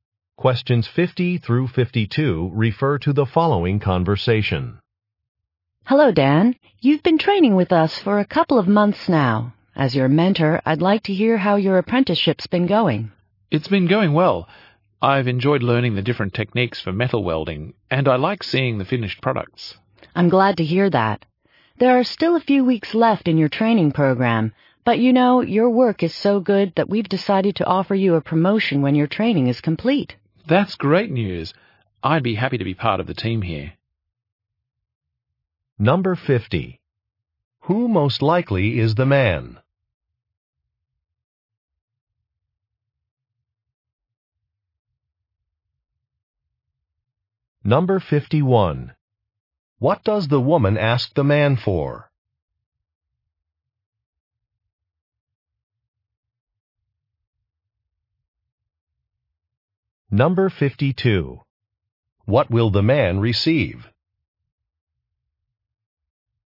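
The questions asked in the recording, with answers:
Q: Who most likely is the man?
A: An apprentice welder

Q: What does the woman ask the man for?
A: Feedback on his apprenticeship

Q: What will the man receive?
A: A promotion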